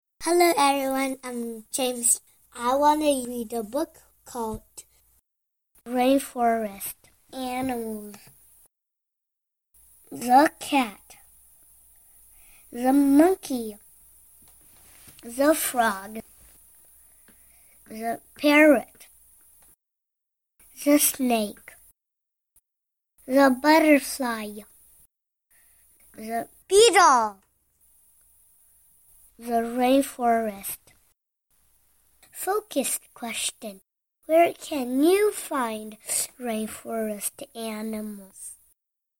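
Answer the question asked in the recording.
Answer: In the rainforest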